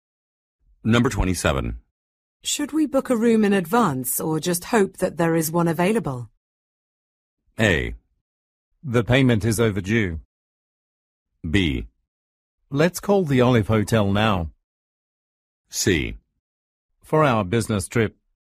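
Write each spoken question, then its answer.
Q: Should we book a room in advance or just hope that there is one available?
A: B: Let's call the Olive Hotel now.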